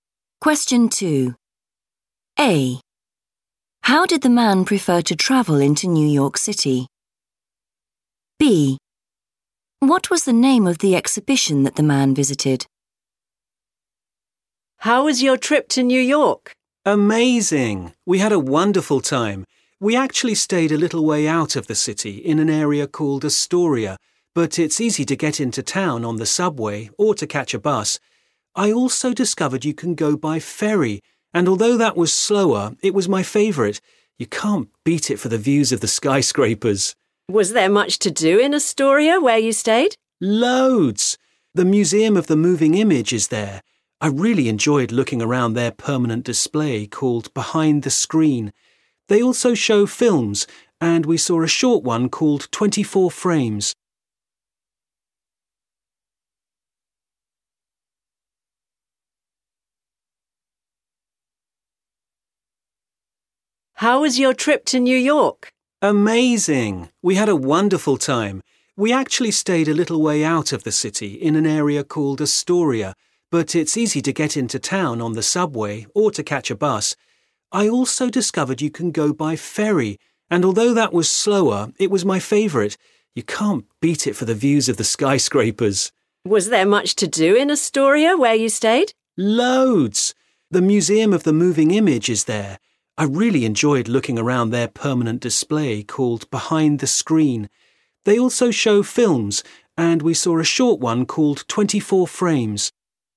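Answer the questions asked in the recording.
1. by ferry
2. Behind the Screen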